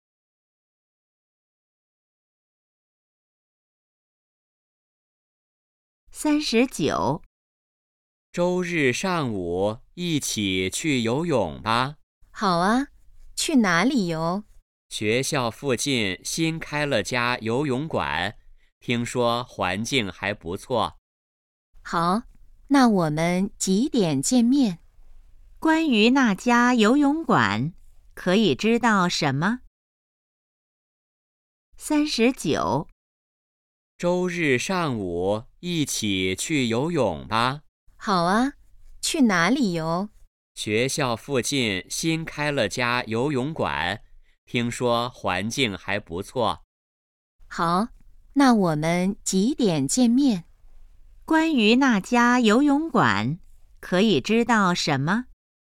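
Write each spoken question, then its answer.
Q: 关于那家游泳馆,可以知道什么?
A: 新开的,在学校附近,环境不错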